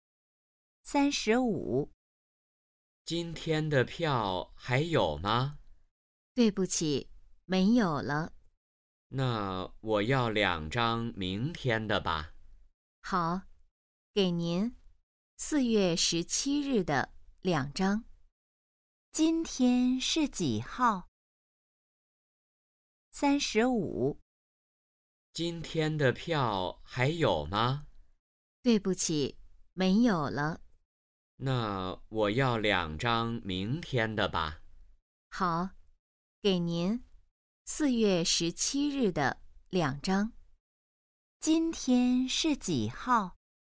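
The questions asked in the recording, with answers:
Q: 今天是几号?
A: 四月十六日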